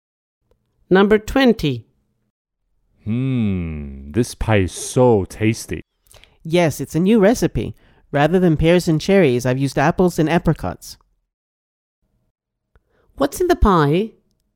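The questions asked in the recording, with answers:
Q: What's in the pie?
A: apples and apricots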